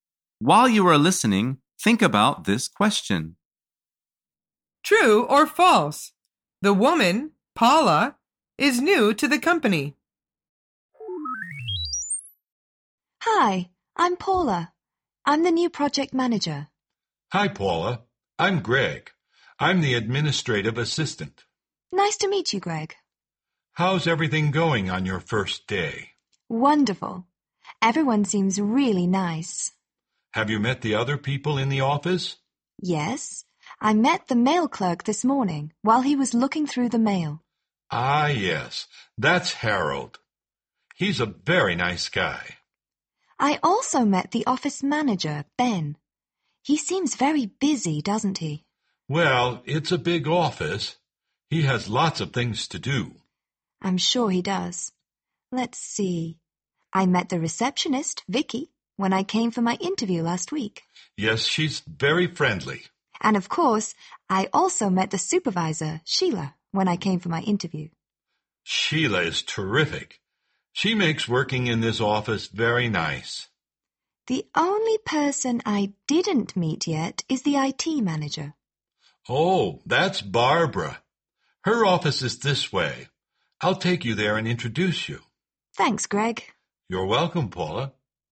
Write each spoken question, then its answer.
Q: True or false? The woman, Paula, is new to the company.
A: The answer is true.